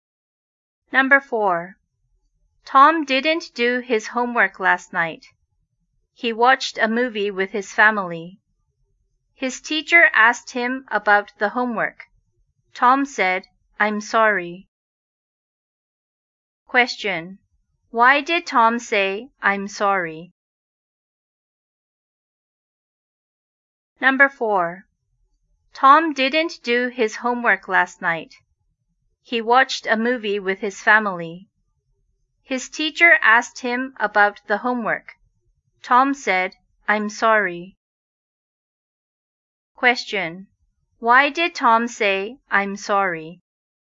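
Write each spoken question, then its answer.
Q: Why did Tom say, "I'm sorry"?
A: Because he didn't do his homework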